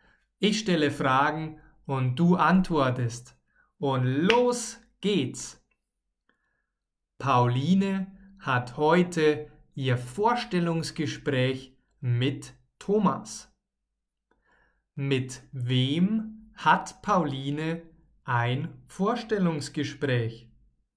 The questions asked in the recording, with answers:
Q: Mit wem hat Pauline ein Vorstellungsgespräch?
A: Mit Thomas.